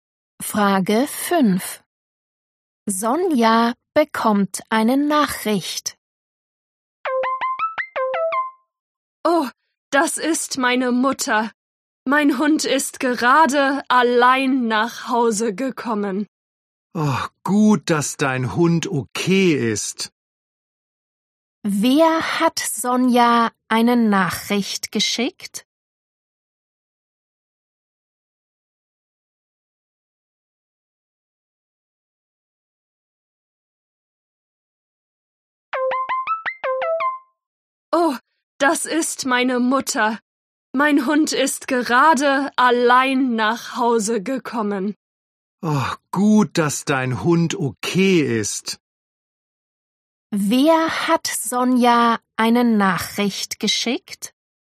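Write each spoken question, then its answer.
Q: Wer hat Sonja eine Nachricht geschickt?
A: ihre Mutter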